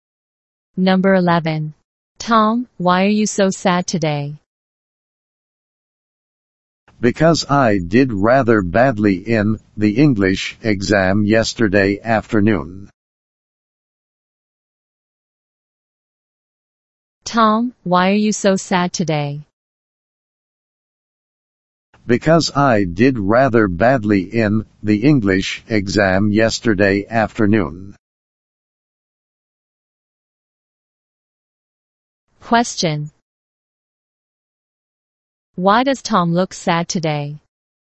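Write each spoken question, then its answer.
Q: Why does Tom look sad today?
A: He did rather badly in the English exam yesterday afternoon.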